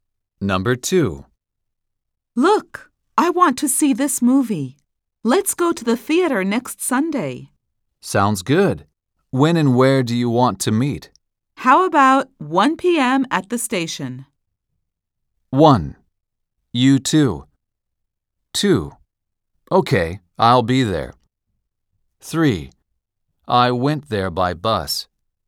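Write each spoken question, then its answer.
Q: How about 1 p.m. at the station?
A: 2: Okay, I'll be there.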